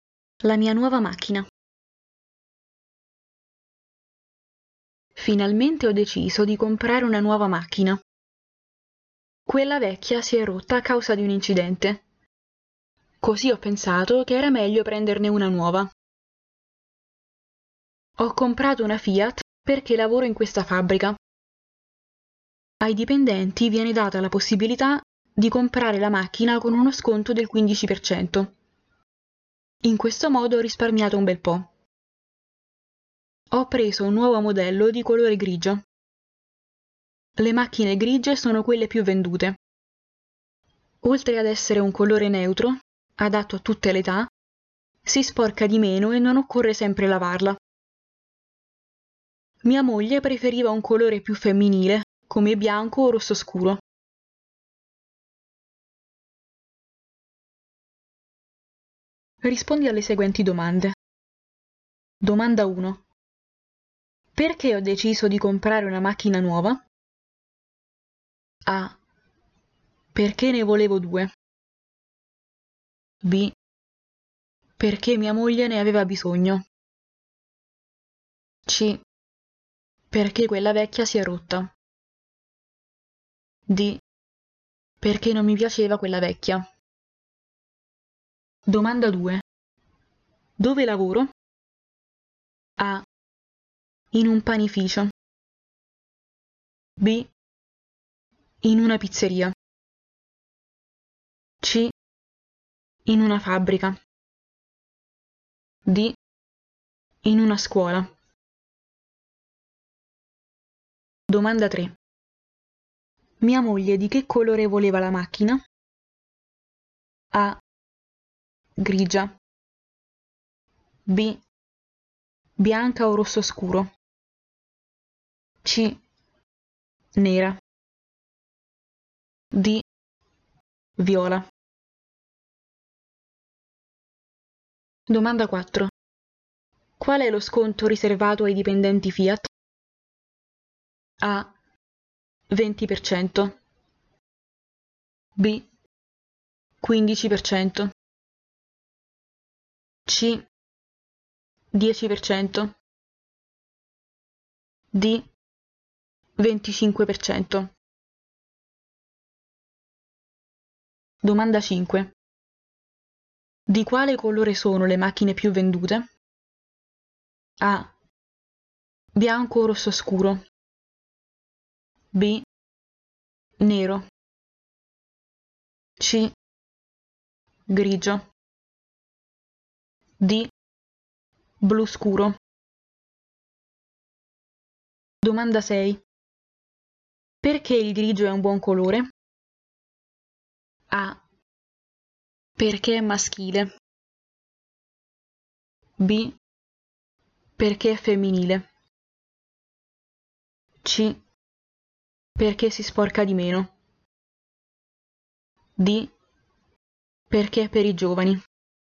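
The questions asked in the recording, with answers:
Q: Perché ho deciso di comprare una macchina nuova?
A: C: Perché quella vecchia si è rotta.

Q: Dove lavoro?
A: C: In una fabbrica.

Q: Mia moglie di che colore voleva la macchina?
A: B: Bianca o rosso scuro.

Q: Qual è lo sconto riservato ai dipendenti Fiat?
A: B: 15%.

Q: Di quale colore sono le macchine più vendute?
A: C: Grigio.

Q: Perché il grigio è un buon colore?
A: C: Perché si sporca di meno.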